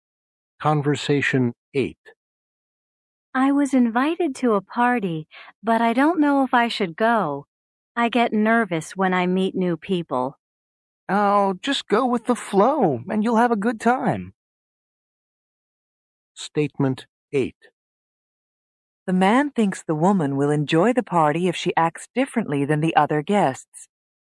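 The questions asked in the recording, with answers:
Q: The man thinks the woman will enjoy the party if she acts differently than the other guests.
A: False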